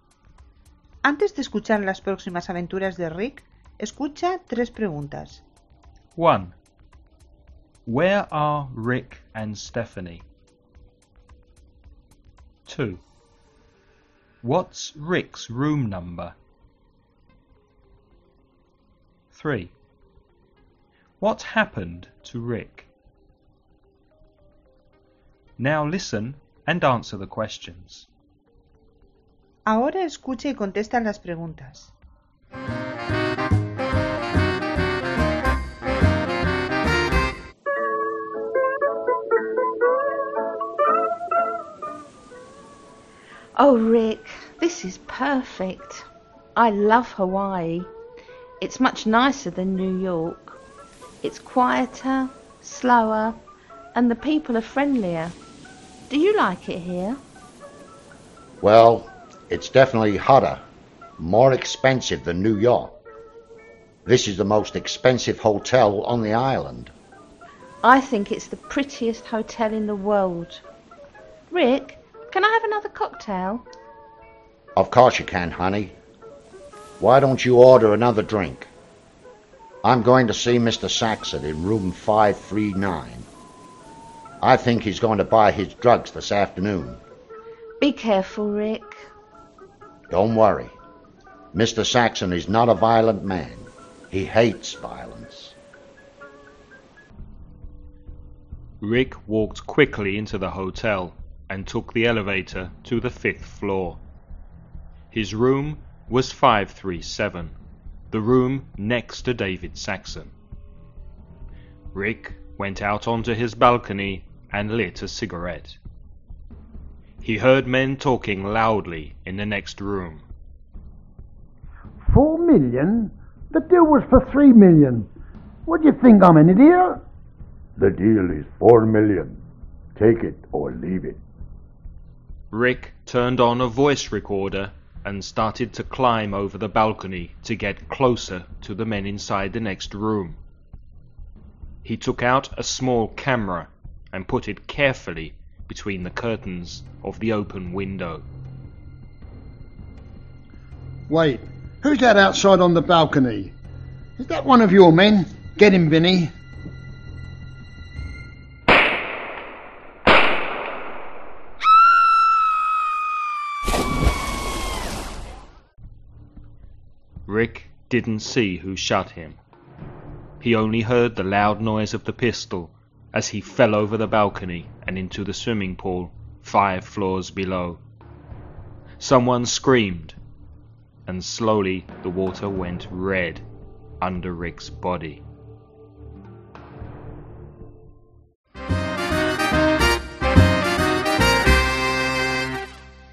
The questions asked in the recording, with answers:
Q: Where are Rick and Stephanie?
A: In a hotel in Hawaii.

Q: What's Rick's room number?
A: Room 537.

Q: What happened to Rick?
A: He was shot.